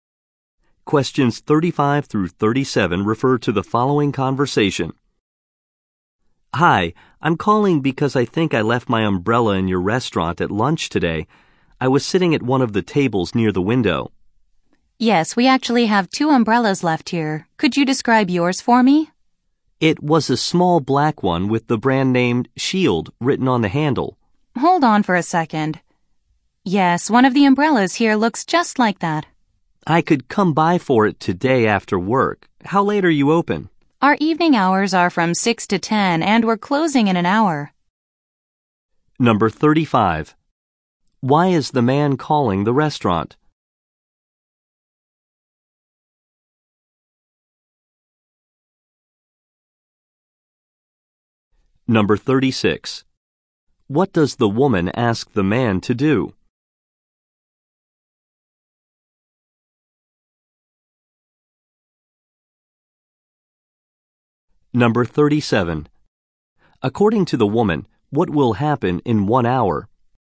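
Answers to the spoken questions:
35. He left his umbrella there.
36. Describe his umbrella.
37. The restaurant will close.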